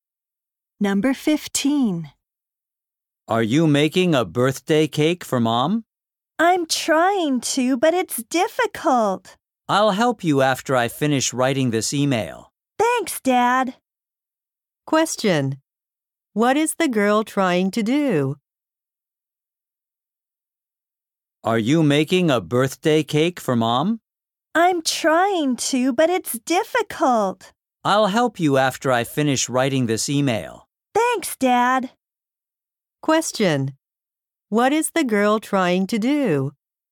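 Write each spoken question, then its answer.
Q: What is the girl trying to do?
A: Make a birthday cake for her mom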